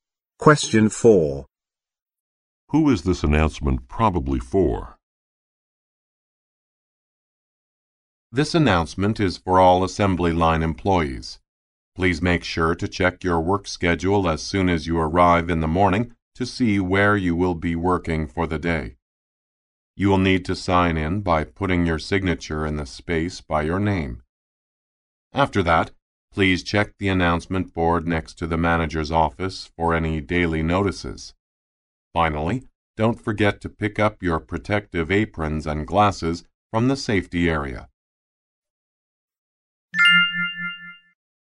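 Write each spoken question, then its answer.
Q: Who is this announcement probably for?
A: Assembly line employees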